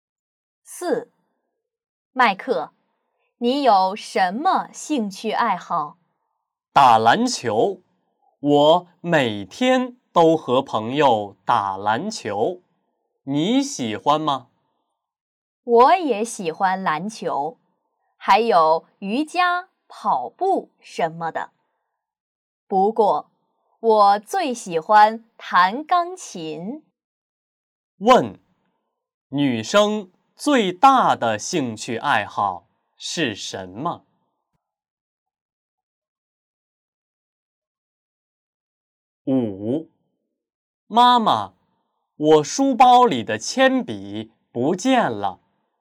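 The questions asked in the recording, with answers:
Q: 问,女生最大的兴趣爱好是什么?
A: 弹钢琴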